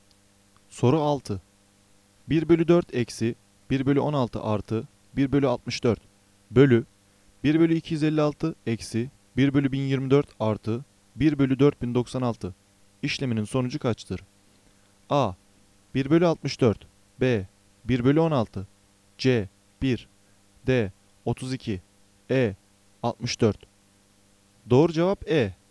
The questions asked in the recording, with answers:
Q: 1 bölü 4 eksi 1 bölü 16 artı 1 bölü 64 bölü 1 bölü 256 eksi 1 bölü 1024 artı 1 bölü 4096 işleminin sonucu kaçtır?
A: Doğru cevap E.